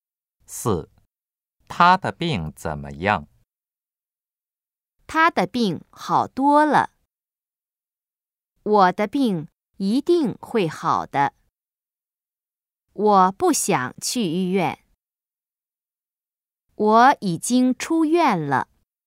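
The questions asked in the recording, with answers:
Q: 他的病怎么样?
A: A: 他的病好多了。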